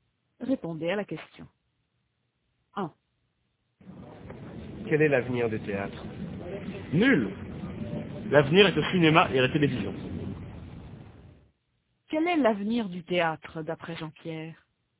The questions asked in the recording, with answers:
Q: Quel est l'avenir du théâtre, d'après Jean-Pierre ?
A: Nul.